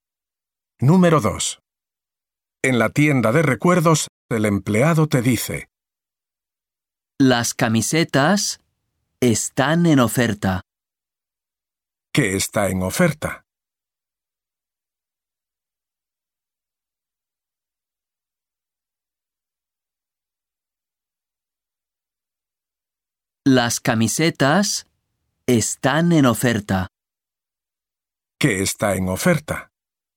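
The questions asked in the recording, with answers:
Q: ¿Qué está en oferta?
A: Las camisetas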